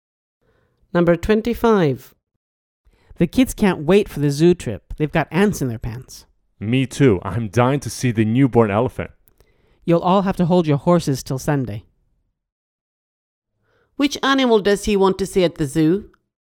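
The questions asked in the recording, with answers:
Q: Which animal does he want to see at the zoo?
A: The newborn elephant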